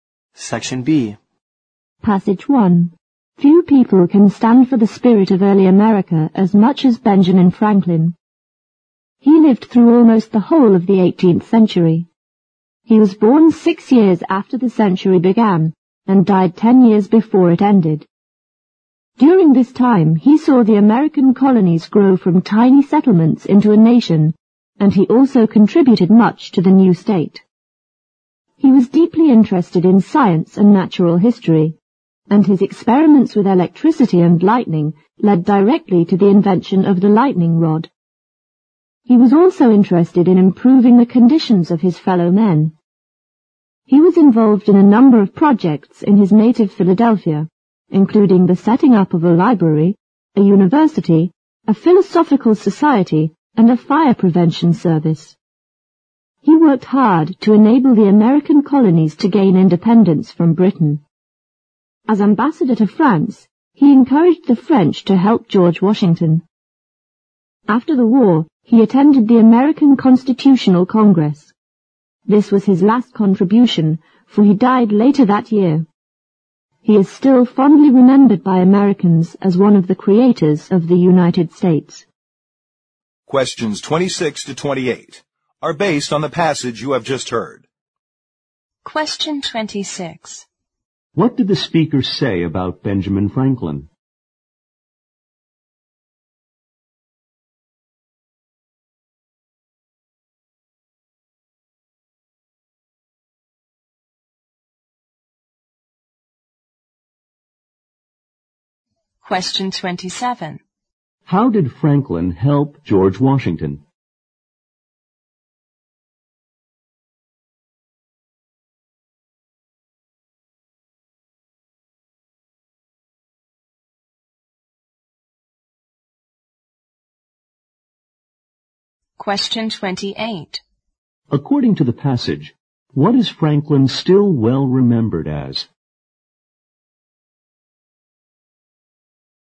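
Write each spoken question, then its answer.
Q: How did Franklin help George Washington?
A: As ambassador to France, he encouraged the French to help Washington

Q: According to the passage, what is Franklin still well remembered as?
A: One of the creators of the United States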